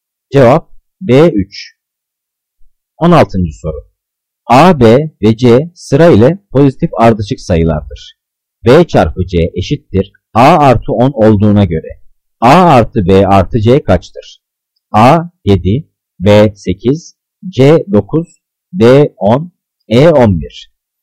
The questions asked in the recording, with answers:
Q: B çarpı C eşittir A artı 10 olduğuna göre A artı B artı C kaçtır?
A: Cevap C 9.